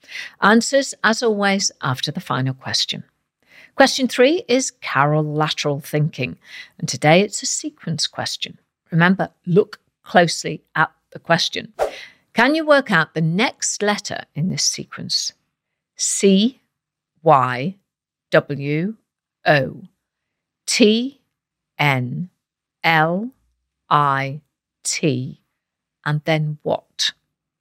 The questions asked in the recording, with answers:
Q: Can you work out the next letter in this sequence?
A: The answer is S